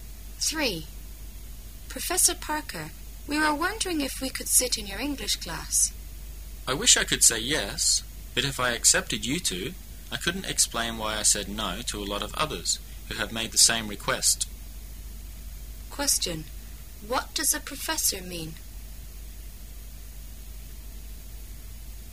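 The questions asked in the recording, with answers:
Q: What does a professor mean?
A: He can't let them sit in on his class

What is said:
Parker, we were wondering if we could sit in your English class. M: I wish I could say "Yes". But if I accepted you two, I couldn't explain why I said "No" to a lot of others who have made the same request.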